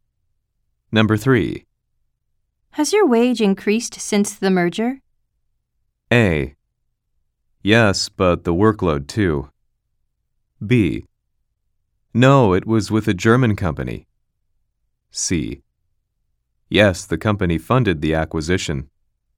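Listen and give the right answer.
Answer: A: Yes, but the workload too.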